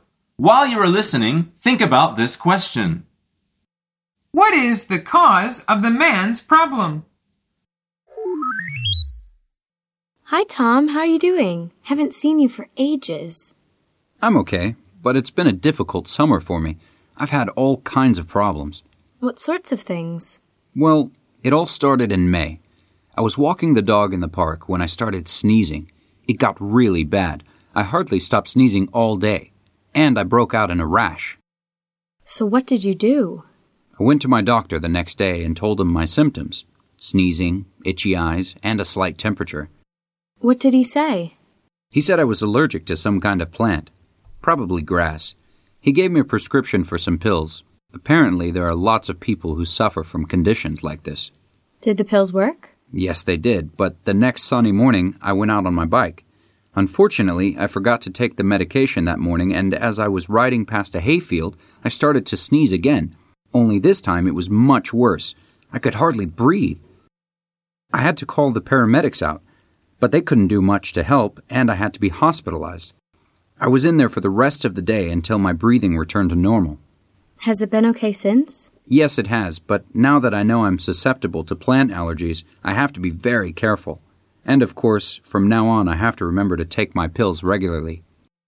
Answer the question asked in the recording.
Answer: The answer is he is allergic to some plants.